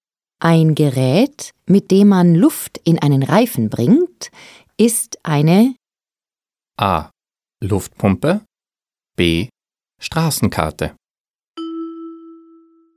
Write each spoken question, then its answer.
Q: Ein Gerät, mit dem man Luft in einen Reifen bringt, ist eine A. Luftpumpe, B. Straßenkarte.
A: A. Luftpumpe.